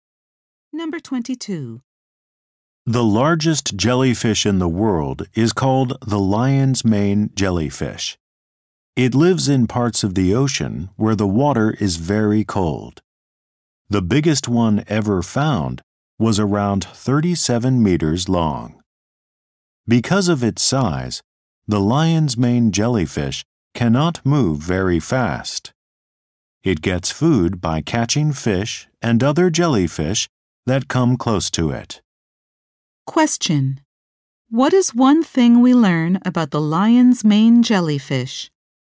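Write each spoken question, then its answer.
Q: What is one thing we learn about the lion's mane jellyfish?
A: It is the largest jellyfish and cannot move very fast.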